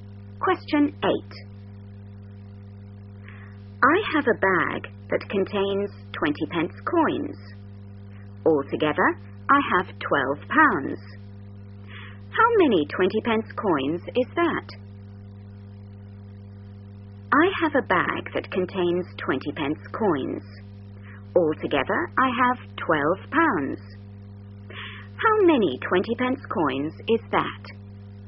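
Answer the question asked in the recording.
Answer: 60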